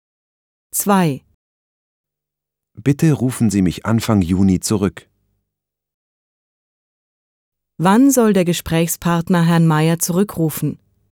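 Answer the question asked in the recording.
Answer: Anfang Juni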